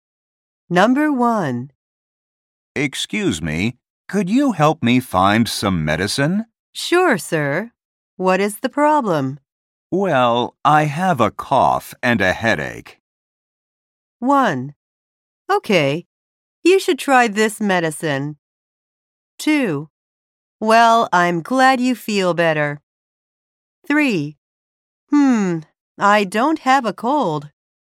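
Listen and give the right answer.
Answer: 1: Okay, you should try this medicine.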